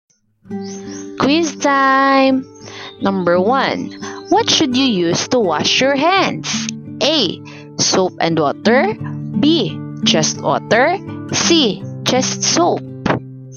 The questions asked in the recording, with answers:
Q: What should you use to wash your hands?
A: Letter A.